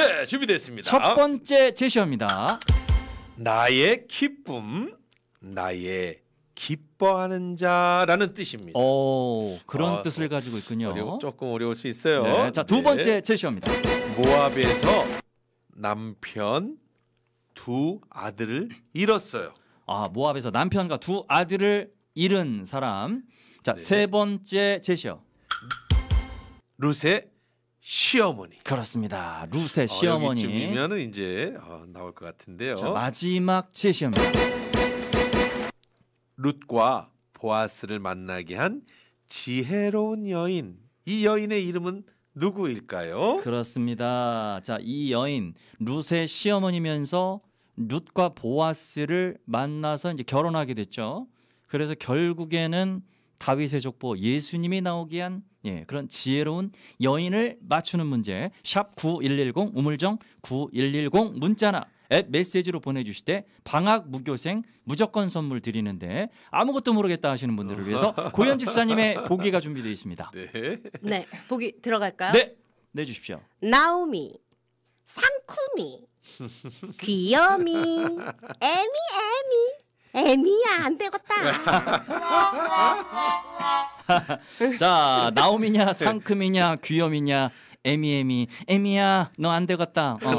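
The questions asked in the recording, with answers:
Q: 룻과 보아스를 만나게 한 지혜로운 여인. 이 여인의 이름은 누구일까요?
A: 나오미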